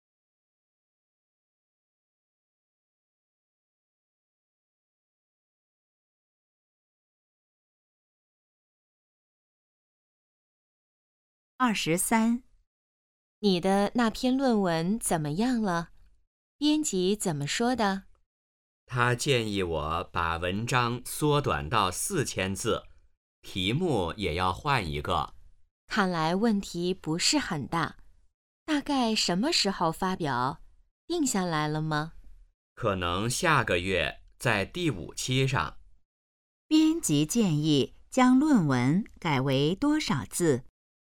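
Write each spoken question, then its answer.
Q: 编辑建议将论文改为多少字?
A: 4000字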